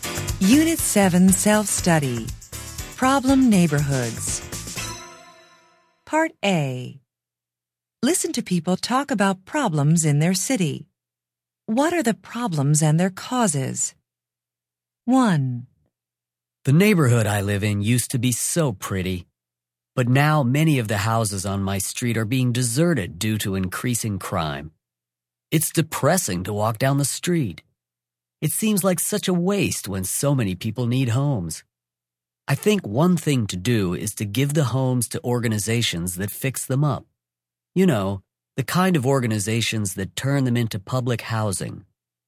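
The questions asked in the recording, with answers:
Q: What are the problems and their causes?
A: Houses are being deserted due to increasing crime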